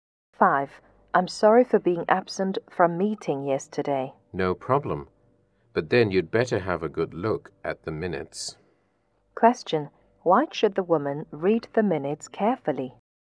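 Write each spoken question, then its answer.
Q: Why should the woman read the minutes carefully?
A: Because she was absent from the meeting yesterday.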